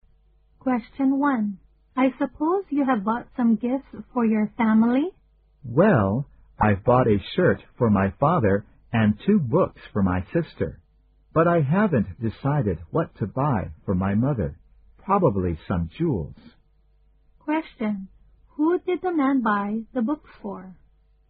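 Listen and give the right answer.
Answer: His sister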